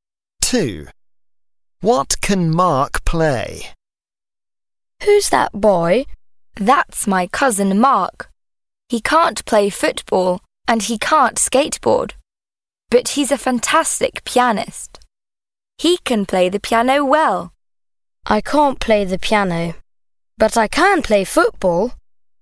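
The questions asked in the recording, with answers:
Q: What can Mark play?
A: The piano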